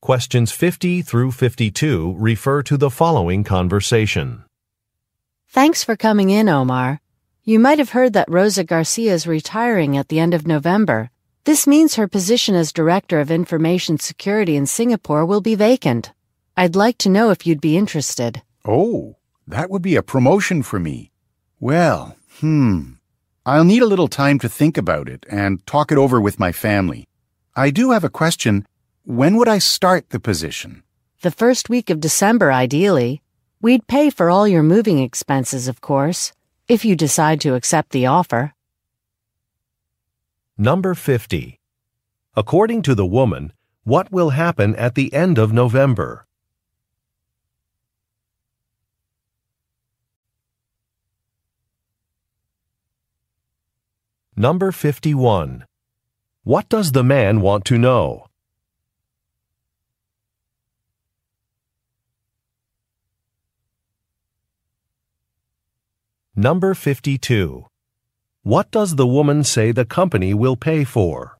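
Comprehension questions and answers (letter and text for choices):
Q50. According to the woman, what will happen at the end of November?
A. An executive will visit.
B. An employee will retire.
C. A product will be released.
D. A study will be completed.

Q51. What does the man want to know?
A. Where he would be working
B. When he would be starting a job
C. How to get to an office building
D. Why an event time has changed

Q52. What does the woman say the company will pay for?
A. A work vehicle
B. A private office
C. Moving expenses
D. Visitors' meals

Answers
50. B. An employee will retire.
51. B. When he would be starting a job
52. C. Moving expenses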